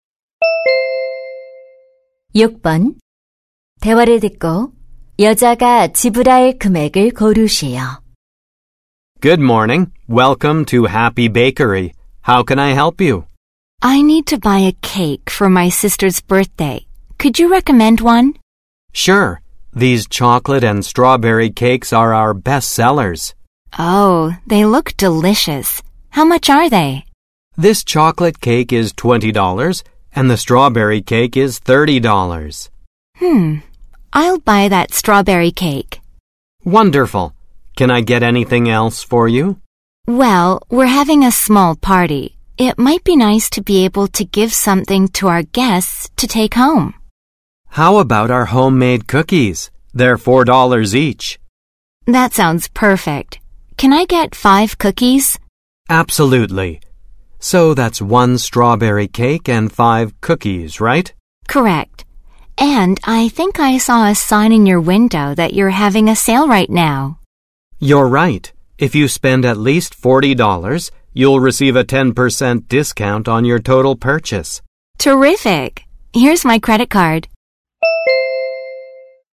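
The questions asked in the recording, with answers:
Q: 대화를 듣고 여자가 지불할 금액을 고르시오.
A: 45달러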